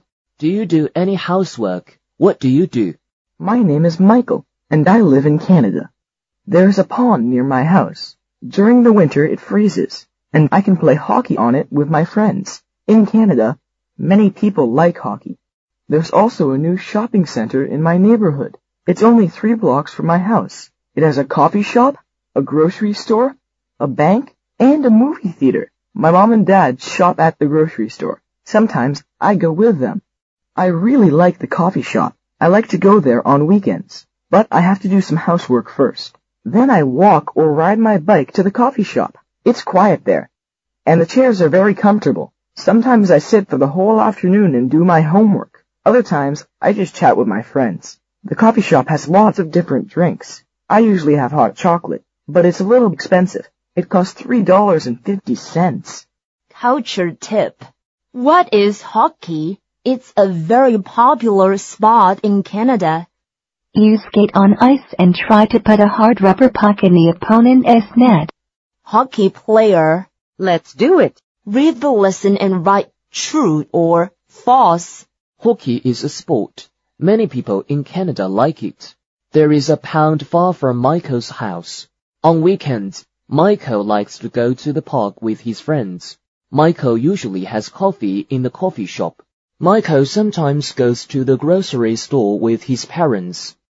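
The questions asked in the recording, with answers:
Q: Hockey is a sport. Many people in Canada like it.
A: True

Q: There is a pond far from Michael's house.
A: False

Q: On weekends, Michael likes to go to the park with his friends.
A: False

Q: Michael usually has coffee in the coffee shop.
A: False

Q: Michael sometimes goes to the grocery store with his parents.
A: True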